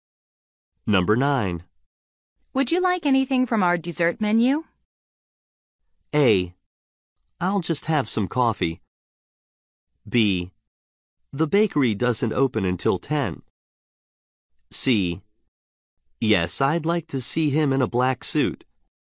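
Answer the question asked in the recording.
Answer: A: I'll just have some coffee.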